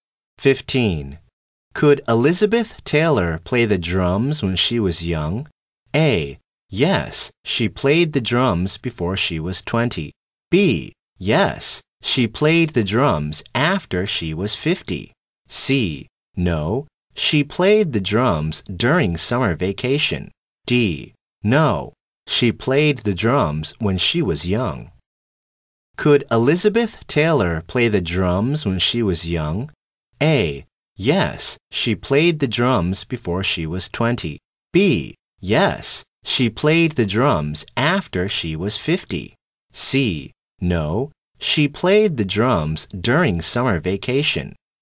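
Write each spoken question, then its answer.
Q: Could Elizabeth Taylor play the drums when she was young?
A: A: Yes, she played the drums before she was 20.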